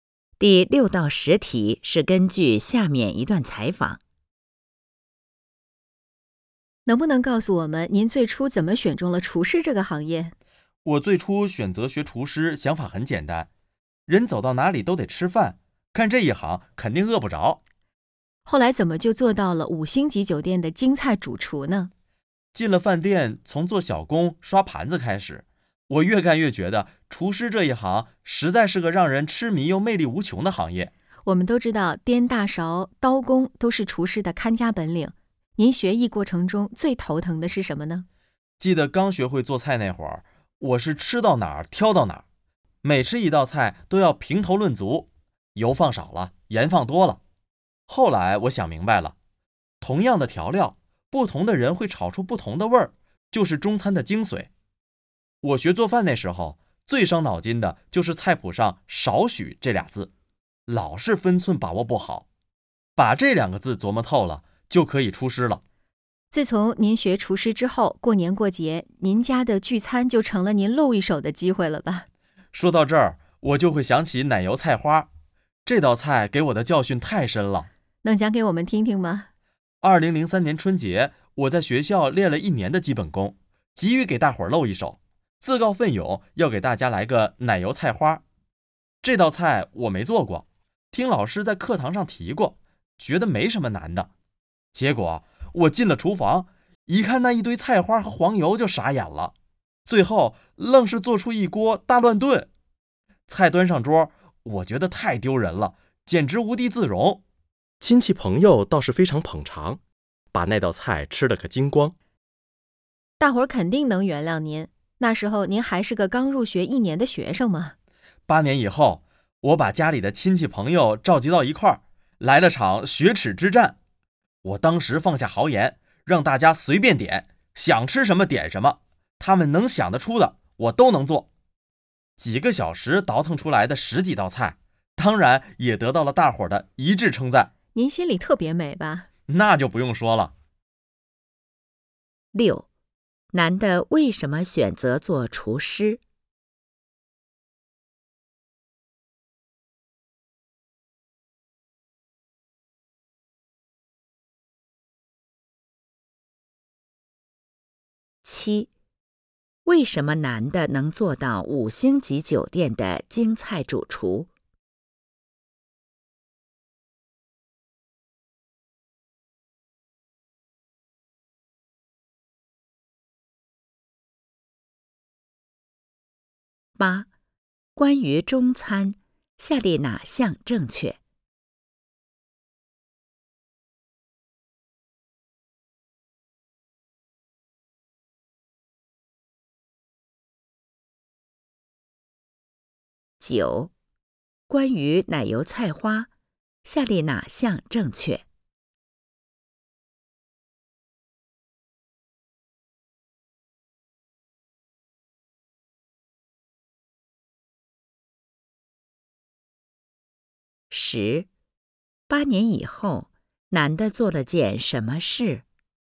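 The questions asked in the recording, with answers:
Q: 男的为什么选择做厨师?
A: 人走到哪里都得吃饭,干这一行肯定饿不着

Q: 为什么男的能做到五星级酒店的京菜主厨?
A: 他越干越觉得厨师这一行让人痴迷、魅力无穷

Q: 8年以后,男的做了件什么事?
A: 召集亲戚朋友,让大家随便点菜,做了十几道菜(雪耻)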